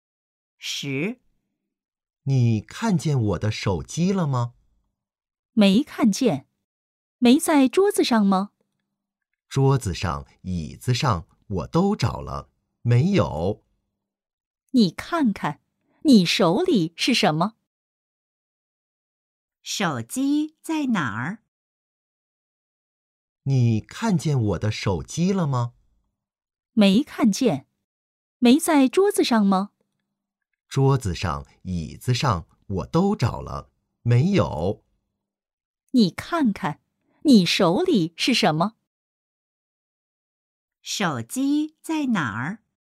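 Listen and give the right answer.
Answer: 在他手里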